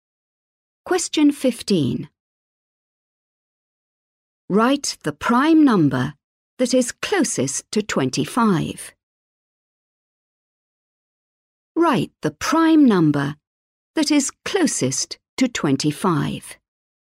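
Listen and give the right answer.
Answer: 23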